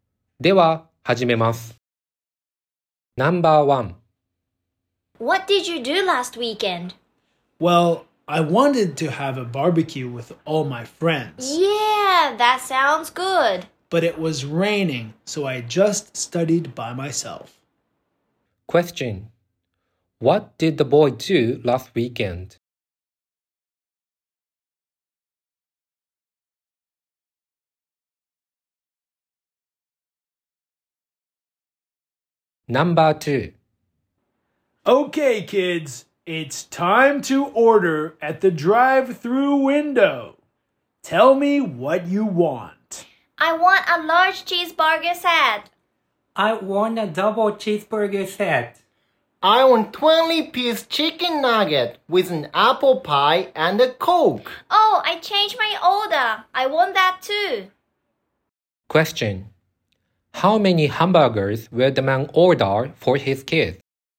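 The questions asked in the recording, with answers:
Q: What did the boy do last weekend?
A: He studied by himself.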